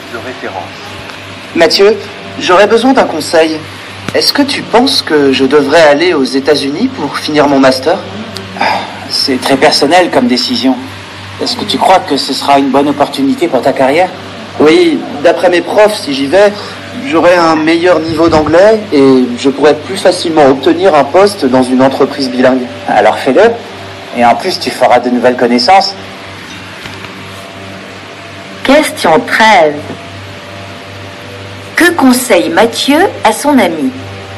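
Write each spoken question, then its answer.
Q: Que conseille Mathieu à son ami?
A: D'aller aux États-Unis pour finir son master.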